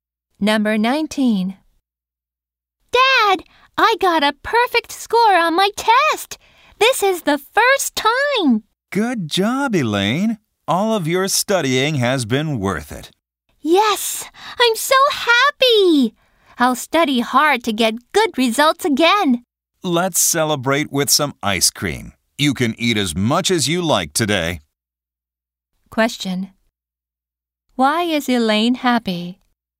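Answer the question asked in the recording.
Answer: She got a perfect score on her test.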